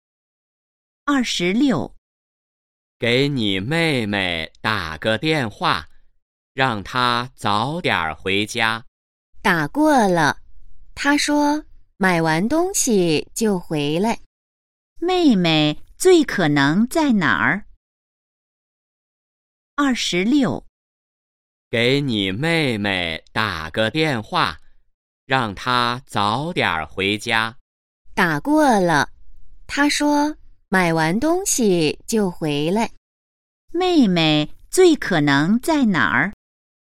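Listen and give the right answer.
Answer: 商店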